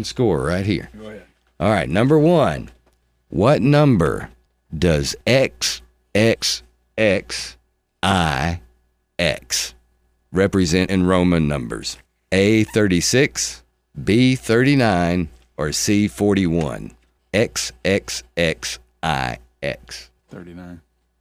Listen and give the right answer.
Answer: 39.